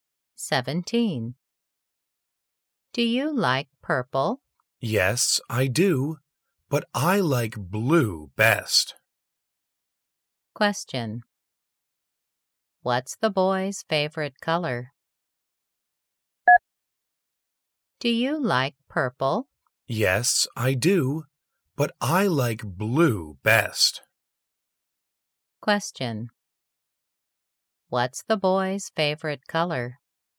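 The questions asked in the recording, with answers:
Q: What's the boy's favorite color?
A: blue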